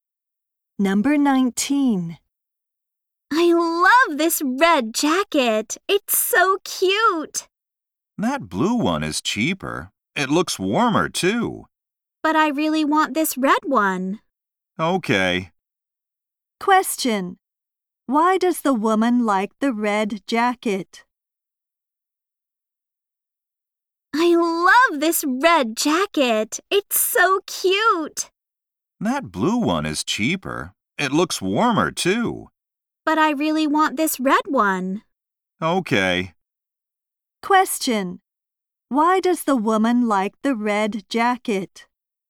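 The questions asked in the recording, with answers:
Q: Why does the woman like the red jacket?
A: It's cute.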